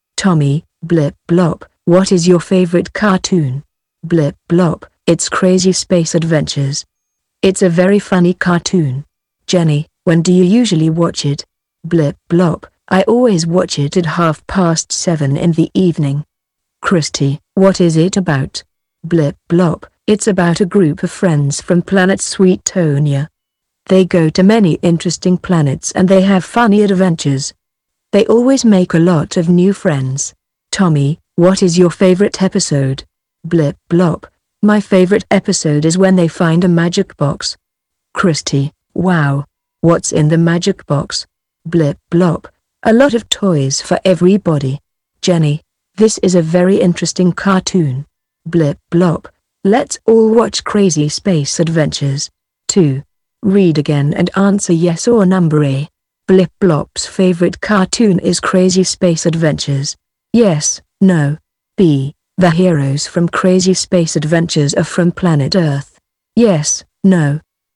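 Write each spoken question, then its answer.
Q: Blip Blop's favorite cartoon is Crazy Space Adventures.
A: Yes

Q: The heroes from Crazy Space Adventures are from planet Earth. Yes, no.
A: No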